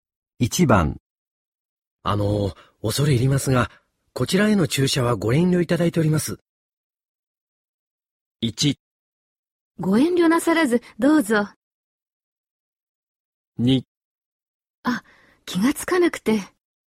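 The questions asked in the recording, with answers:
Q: あの、恐れ入りますが、こちらへの注射はご遠慮いただいております。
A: 2: あ、気がつかなくて。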